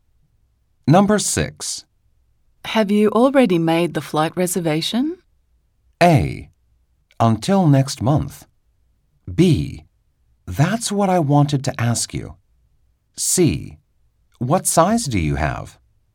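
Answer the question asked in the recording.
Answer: B: That's what I wanted to ask you.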